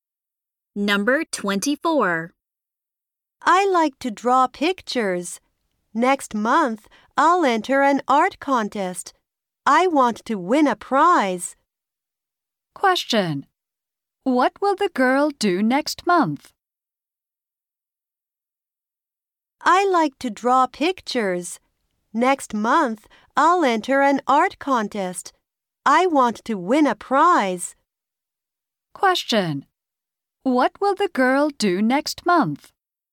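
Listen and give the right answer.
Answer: Enter an art contest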